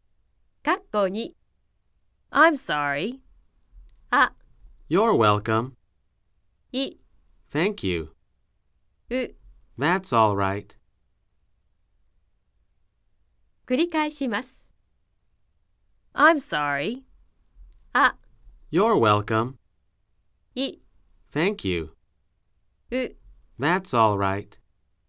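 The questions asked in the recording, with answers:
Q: I'm sorry.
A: う: That's all right.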